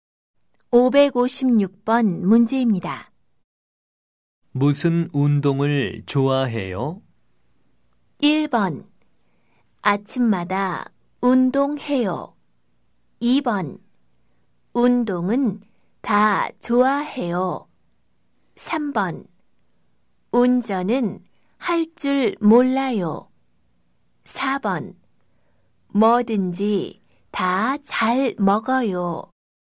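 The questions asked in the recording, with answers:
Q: 무슨 운동을 좋아해요?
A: 2: 운동은 다 좋아해요.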